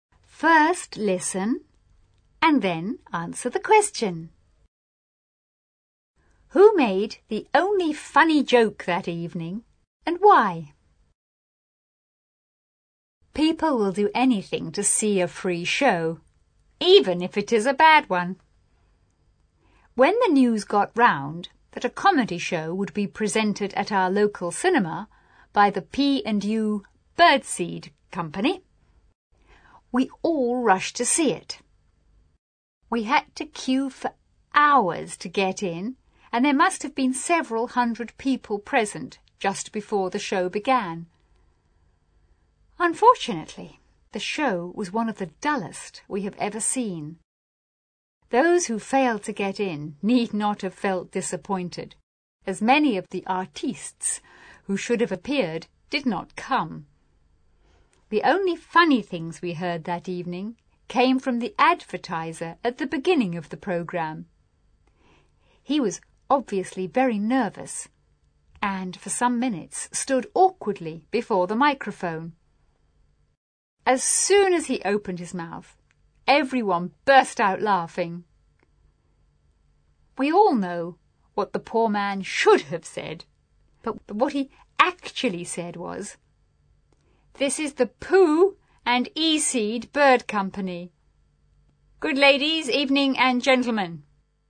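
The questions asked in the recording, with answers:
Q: Who made the only funny joke that evening and why?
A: The advertiser (announcer) at the start of the programme, because he was nervous and mixed up his words.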